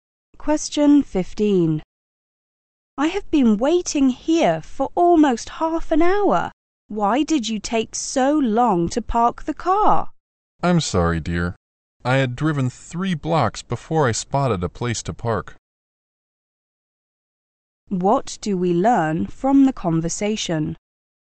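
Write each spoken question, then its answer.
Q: What do we learn from the conversation?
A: The man had difficulty finding a parking place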